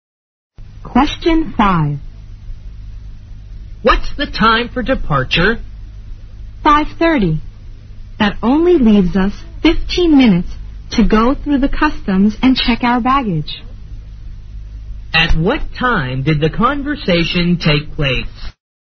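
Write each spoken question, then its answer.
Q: At what time did the conversation take place?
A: 5:15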